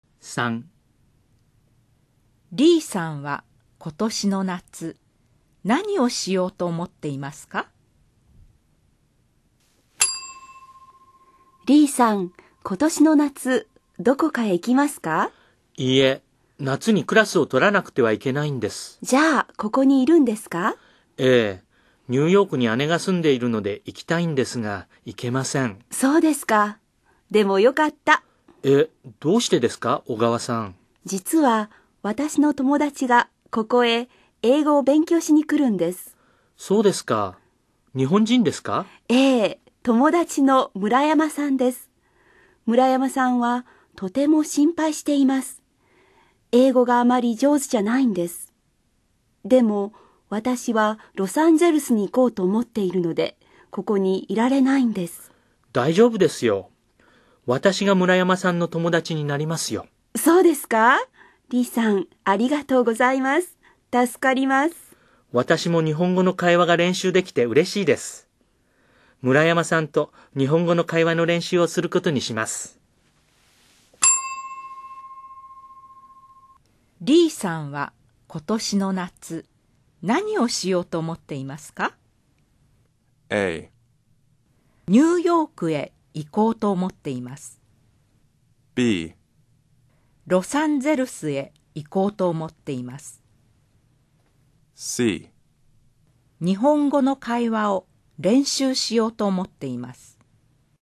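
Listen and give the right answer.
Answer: C: 日本語の会話を練習しようと思っています。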